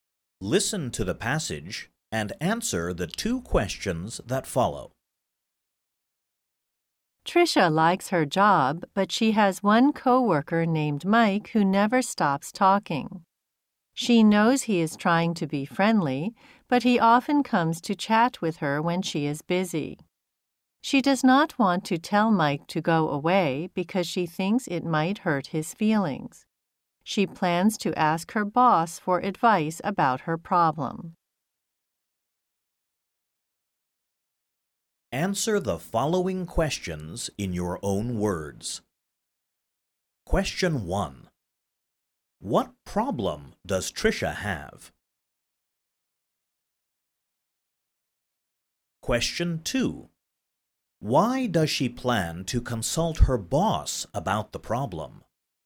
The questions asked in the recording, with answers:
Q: What problem does Trisha have?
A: One of her coworkers talks to her too much.

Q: Why does she plan to consult her boss about the problem?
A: Because Although she wants to tell her coworker not to speak to her so much, she is afraid of hurting his feelings.